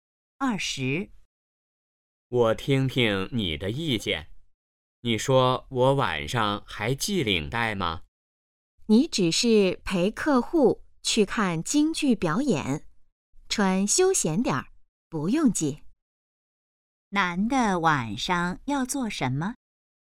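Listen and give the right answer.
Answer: 陪客户看京剧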